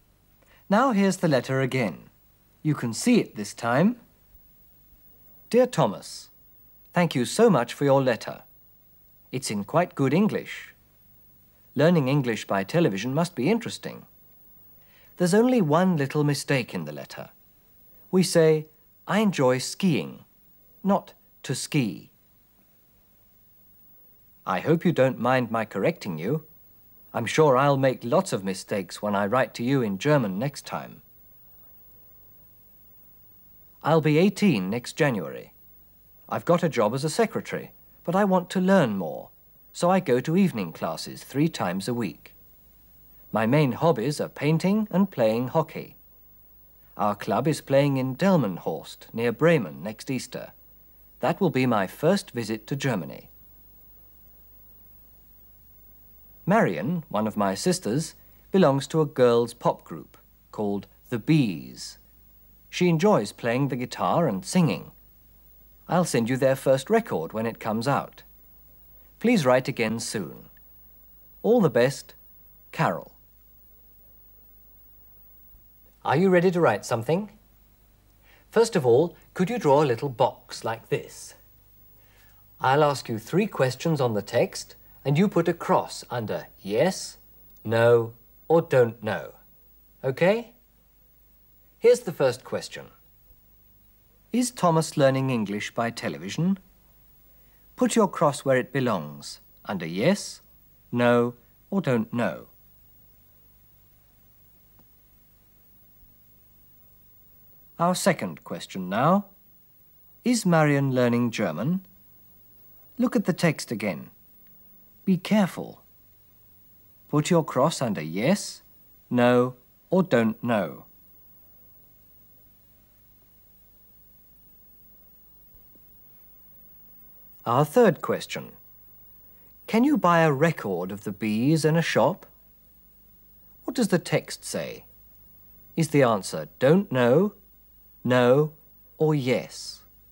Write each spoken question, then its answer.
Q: Is Thomas learning English by television?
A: Das Kreuz unter Yes ist berechtigt.

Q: Is Marion learning German?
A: Also, don't know.

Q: Can you buy a record of the bees in a shop?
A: Daher, no.